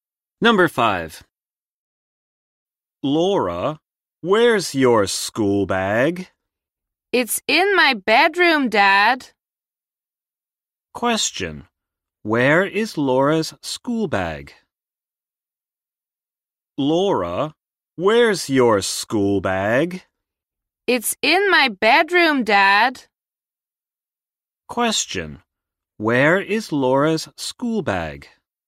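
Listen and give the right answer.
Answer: In her bedroom.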